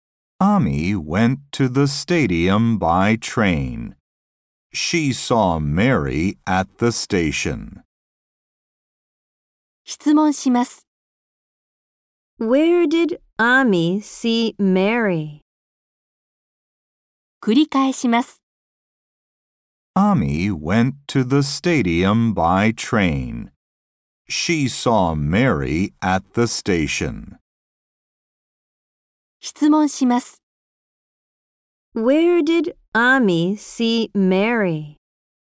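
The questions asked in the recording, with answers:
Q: Where did Ami see Mary?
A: At the station.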